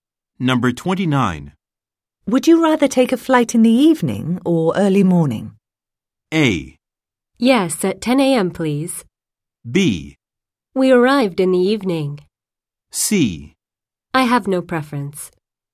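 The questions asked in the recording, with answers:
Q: Would you rather take a flight in the evening or early morning?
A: C: I have no preference.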